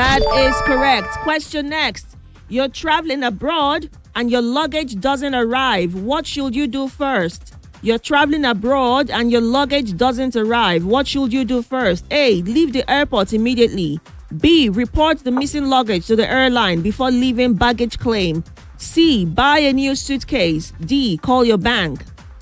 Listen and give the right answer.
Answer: And that is correct.